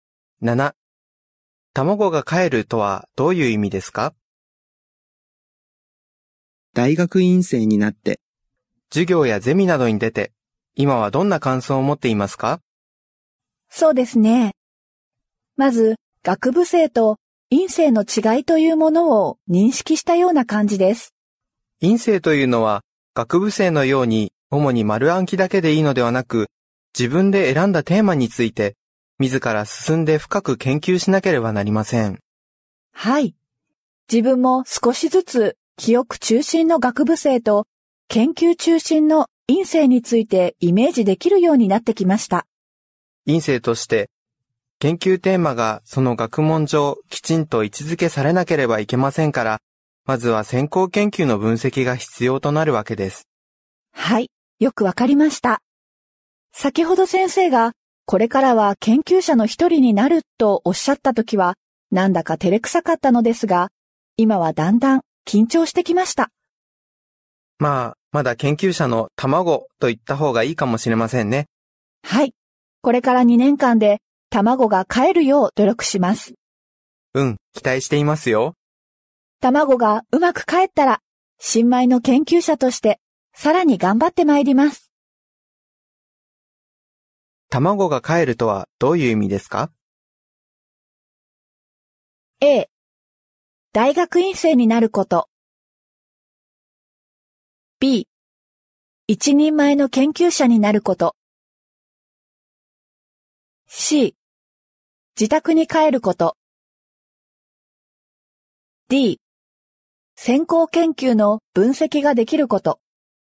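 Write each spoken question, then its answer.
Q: 卵がかえるとはどういう意味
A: B: 一人前の研究者になること。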